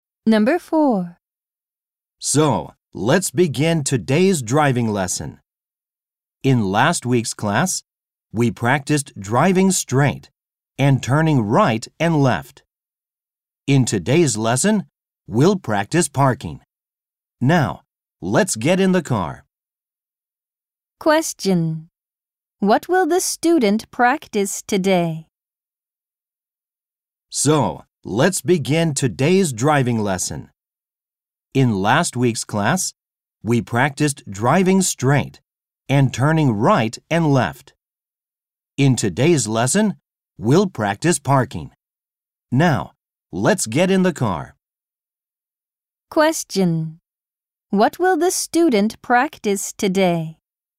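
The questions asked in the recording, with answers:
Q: What will the student practice today?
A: Parking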